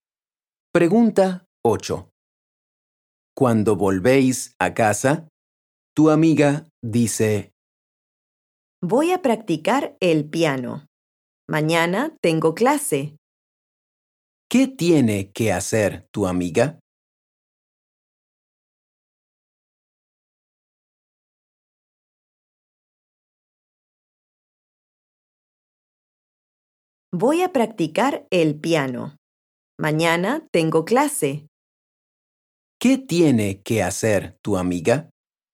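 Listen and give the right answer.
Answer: practicar el piano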